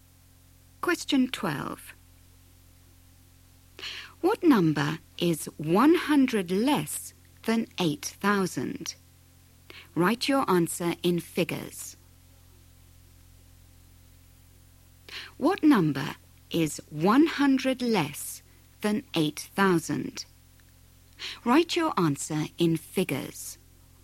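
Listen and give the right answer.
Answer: 7900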